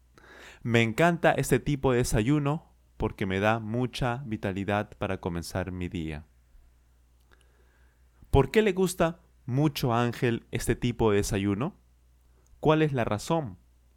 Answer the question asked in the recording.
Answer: porque le da mucha vitalidad para comenzar su día.